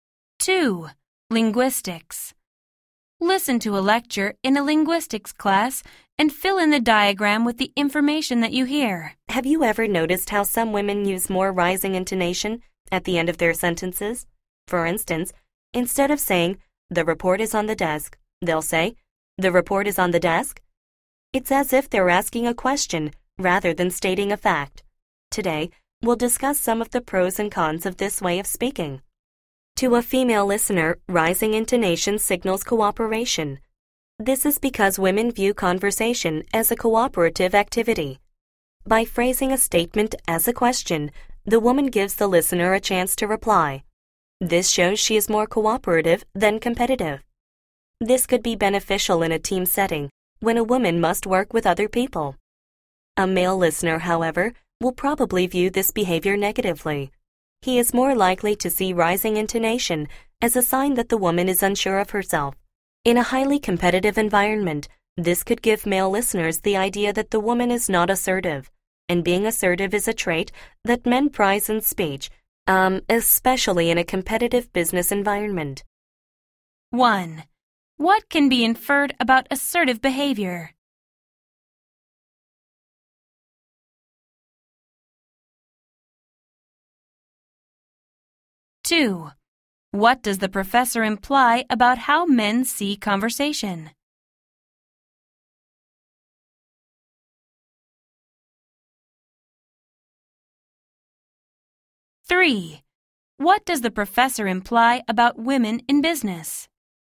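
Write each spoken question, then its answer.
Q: What can be inferred about assertive behavior?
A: Men value it, especially in competitive business settings

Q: what does the professor imply about how men see conversation?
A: Men see conversation as competitive rather than cooperative

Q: what does the professor imply about women in business?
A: Rising intonation may make them seem unsure or not assertive to men in competitive business environments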